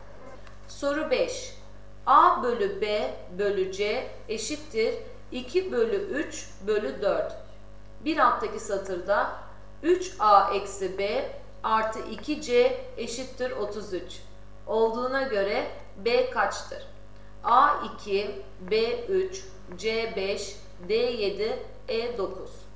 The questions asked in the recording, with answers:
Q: Bir alttaki satırda 3A eksi B artı 2C eşittir 33 olduğuna göre B kaçtır?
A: Doğru cevap E 9.